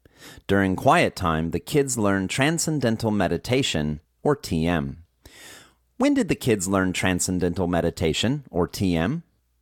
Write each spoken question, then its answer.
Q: When did the kids learn transcendental meditation, or TM?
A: During quiet time, these kids learn transcendental meditation, or TM.